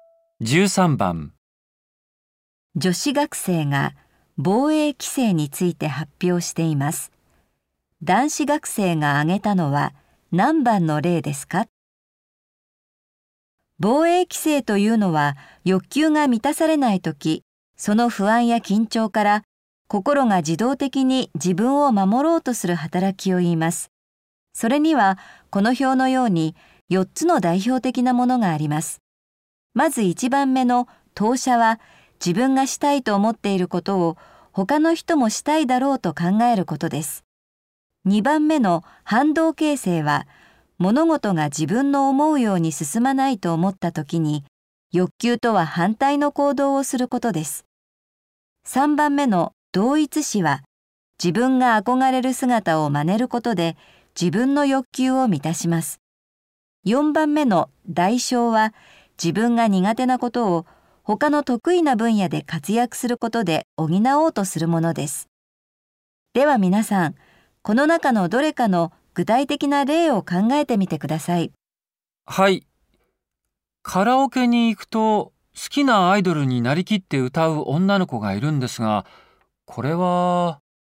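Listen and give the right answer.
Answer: 3番(同一視)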